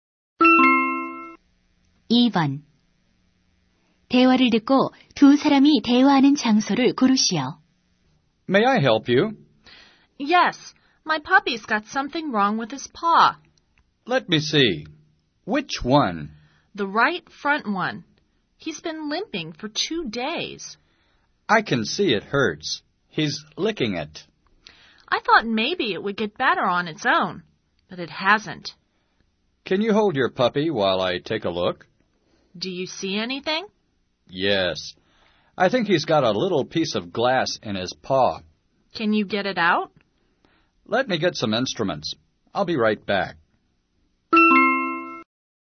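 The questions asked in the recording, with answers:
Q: 대화를 듣고 두 사람이 대화하는 장소를 고르시오.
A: 동물병원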